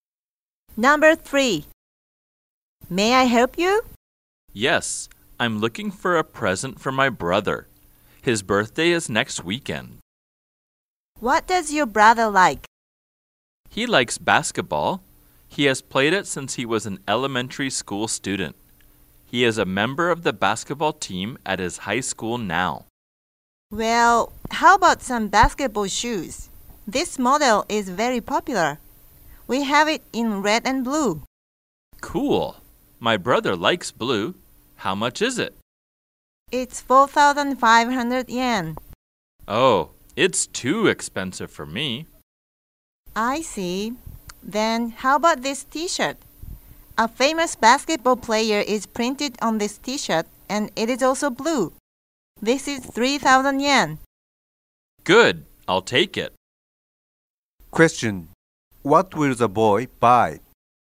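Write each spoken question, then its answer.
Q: Question: What will the boy buy?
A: A blue T-shirt with a famous basketball player printed on it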